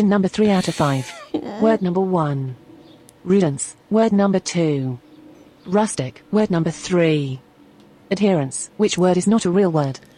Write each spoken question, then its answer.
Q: Which word is not a real word?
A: That's correct. Word number one was a lie.